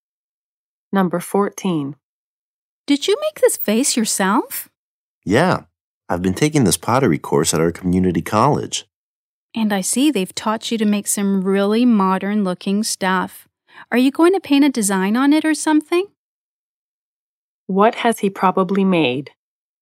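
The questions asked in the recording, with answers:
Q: What has he probably made?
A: A vase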